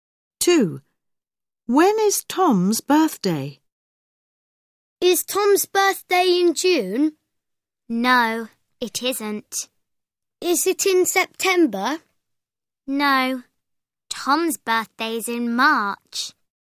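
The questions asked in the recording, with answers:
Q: When is Tom's birthday?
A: In March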